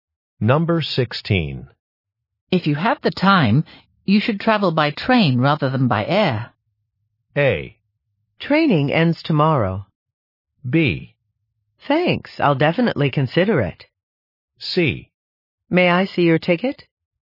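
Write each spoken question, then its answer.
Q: If you have the time, you should travel by train rather than by air.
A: B: Thanks, I'll definitely consider it.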